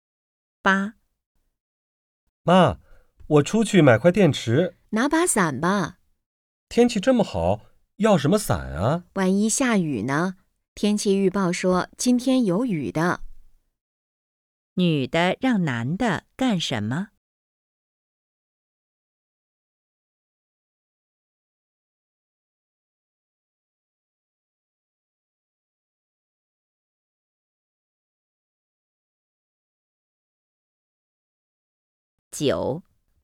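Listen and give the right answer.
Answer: 带伞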